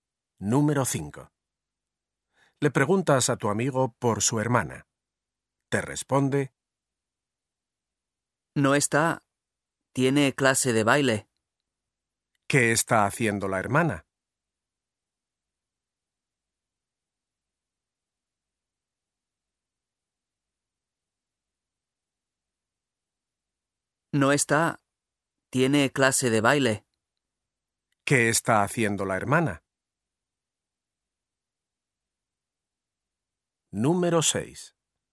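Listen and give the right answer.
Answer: Tiene clase de baile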